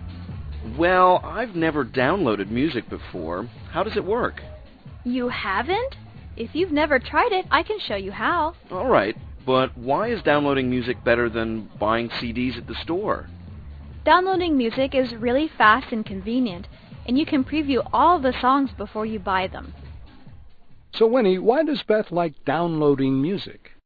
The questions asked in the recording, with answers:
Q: So Winnie, why does Beth like downloading music?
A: 她说啊,从网上下载歌曲又快又方便,还可以在购买前 preview 试听一下。